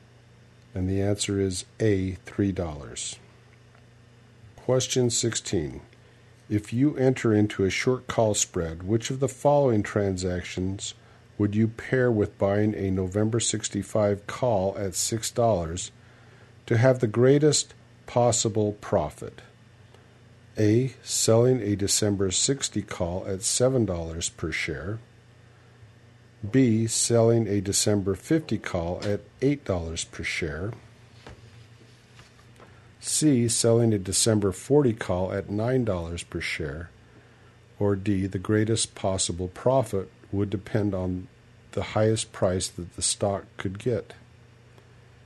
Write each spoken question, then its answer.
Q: If you enter into a short call spread, which of the following transactions would you pair with buying a November 65 call at $6 to have the greatest possible profit?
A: And the answer is C. Selling a December 40 call at $9 per share.